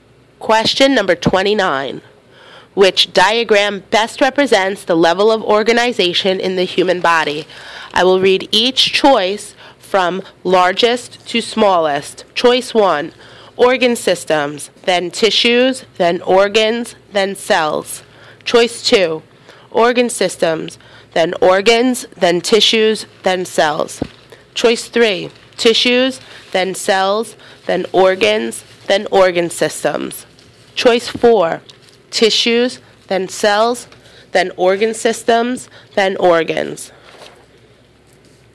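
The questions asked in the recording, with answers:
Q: Which diagram best represents the level of organization in the human body?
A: 2: Organ systems, then organs, then tissues, then cells.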